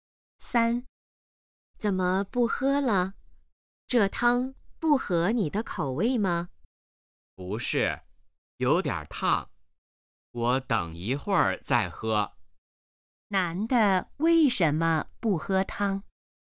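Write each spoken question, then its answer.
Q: 男的为什么不喝汤?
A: 汤有点烫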